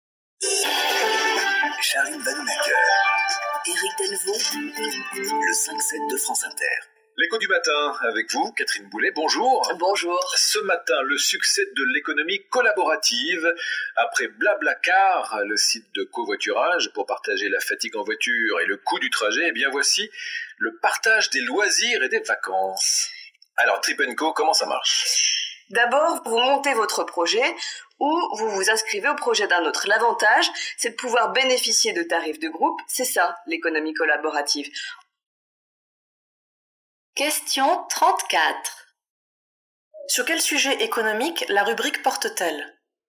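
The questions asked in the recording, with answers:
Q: Sur quel sujet économique la rubrique porte-t-elle ?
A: L'économie collaborative (le partage des loisirs et des vacances)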